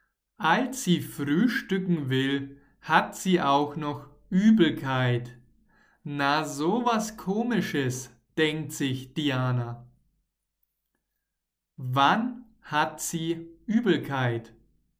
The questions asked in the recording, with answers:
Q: Wann hat sie Übelkeit?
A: Als sie frühstücken will.